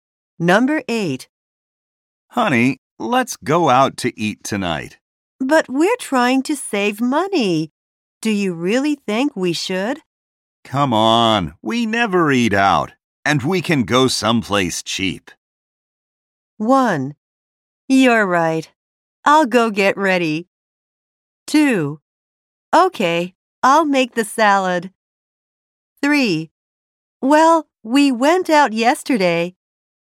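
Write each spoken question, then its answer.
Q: Come on, we never eat out, and we can go someplace cheap.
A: 1: You're right. I'll go get ready.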